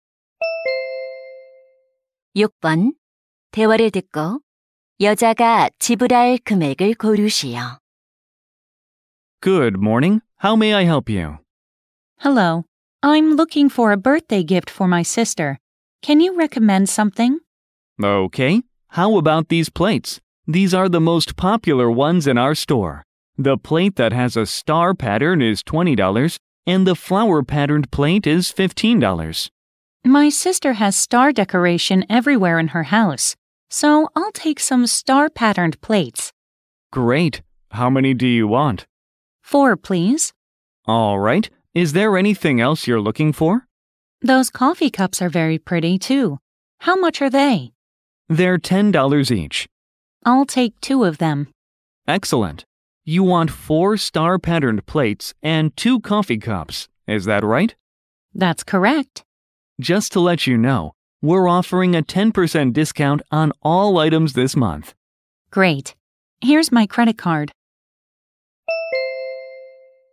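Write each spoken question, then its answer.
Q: 대화를 듣고 여자가 지불할 금액을 고르시오.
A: $90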